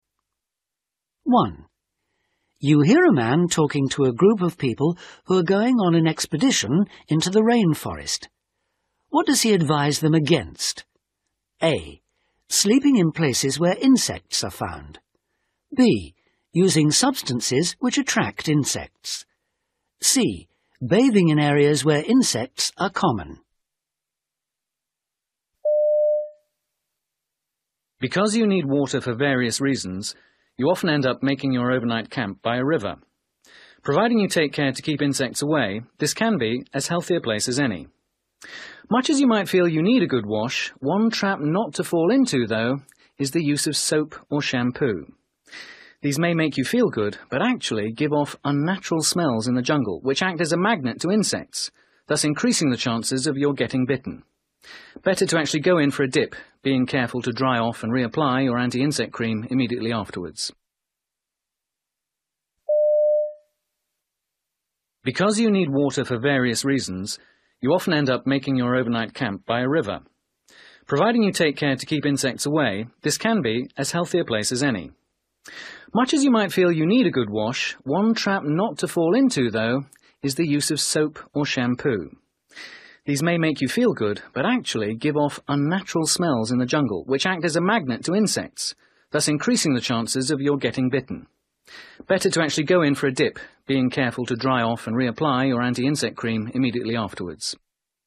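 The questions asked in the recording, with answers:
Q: What does he advise them against?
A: B: Using substances which attract insects.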